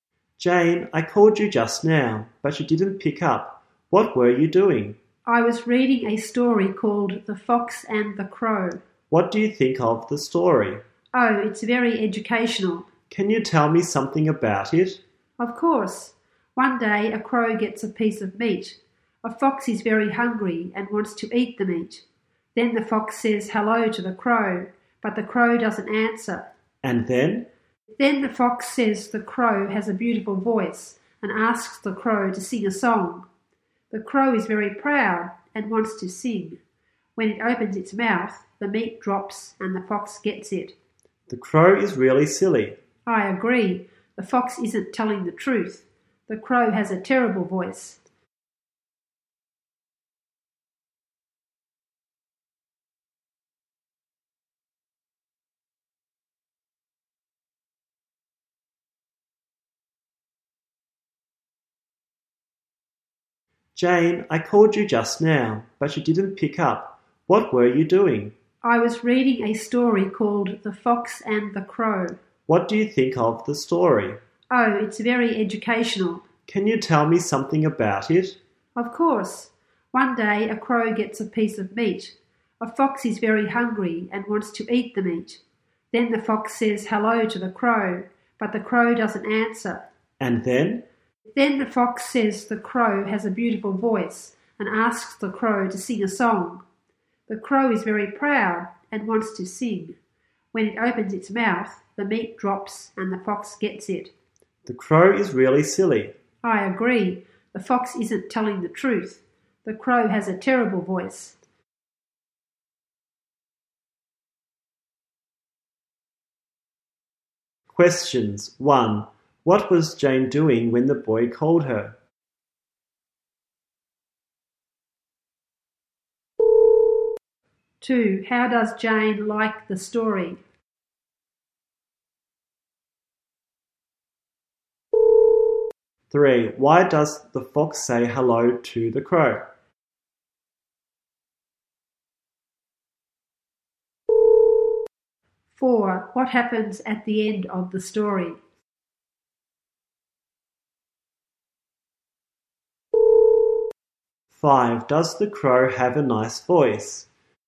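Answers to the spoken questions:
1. Reading a story, The Fox and the Crow
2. It's very educational
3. It is hungry and wants to eat the crow's meat
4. The crow opens its mouth, the meat drops and the fox gets it
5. No, it has a terrible voice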